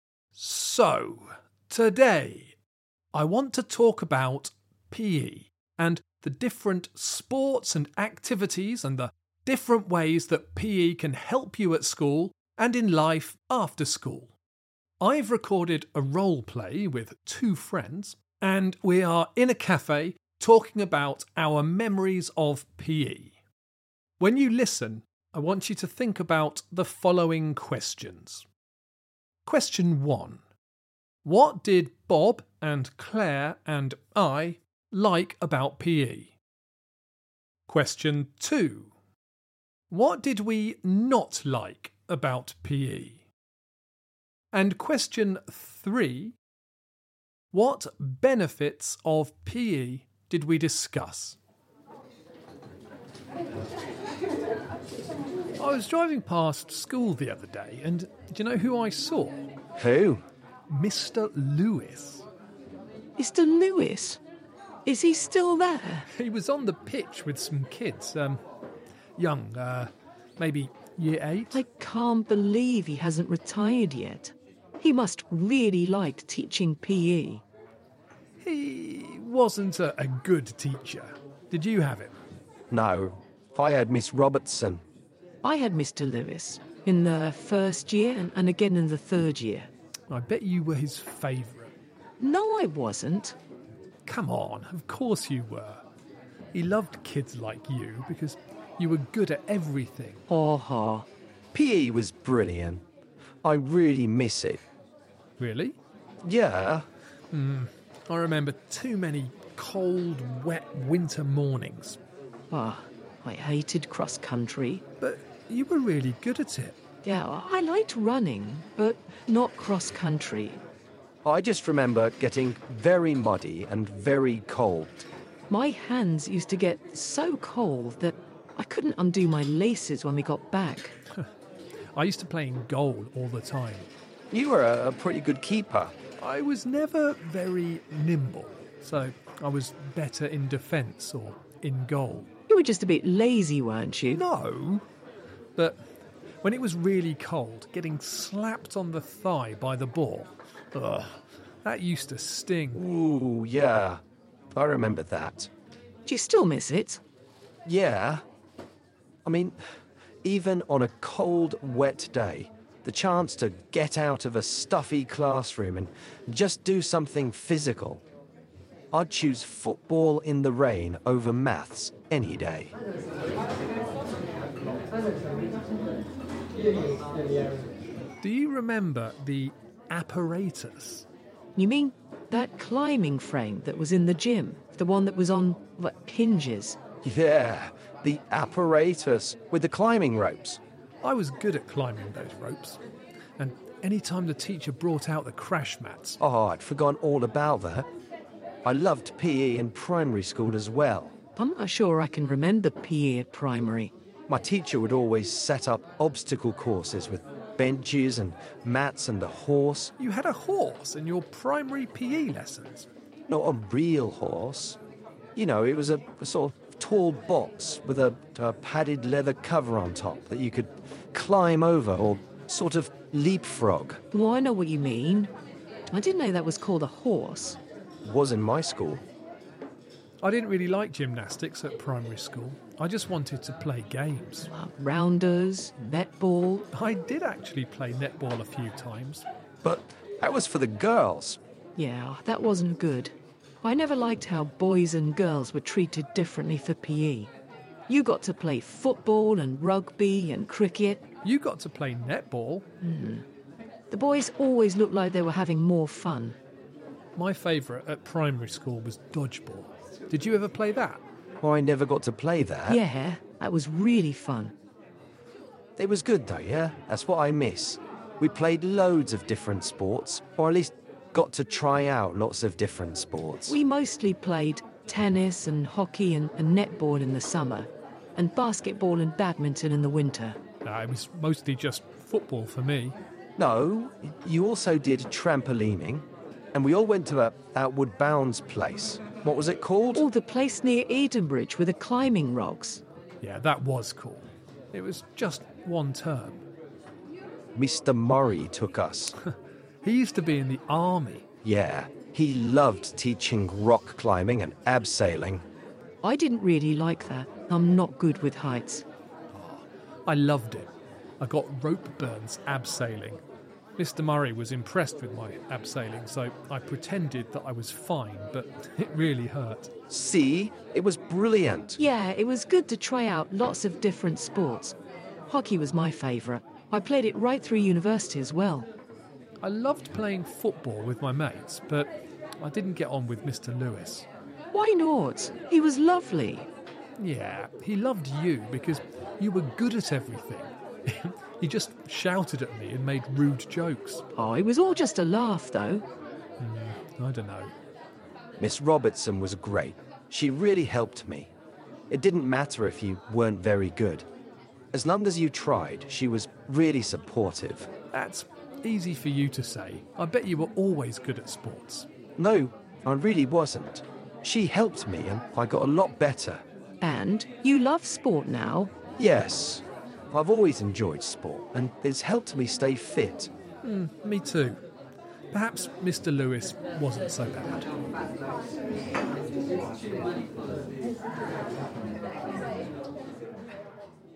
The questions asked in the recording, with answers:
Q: What benefits of PE did we discuss?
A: it got you out of the stuffy classroom and out into fresh air to do something physical.